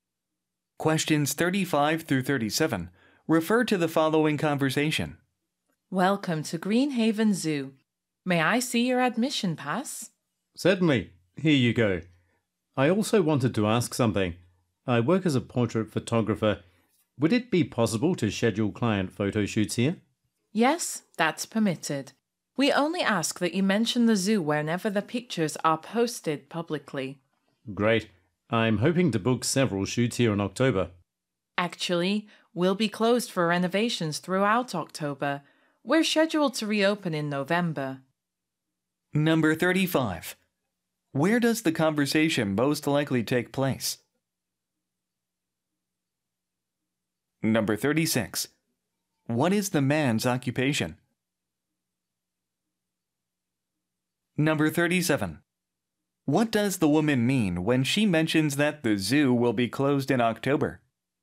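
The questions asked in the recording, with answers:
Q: Where does the conversation most likely take place?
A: At a zoo (Greenhaven Zoo)

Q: What is the man's occupation?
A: Portrait photographer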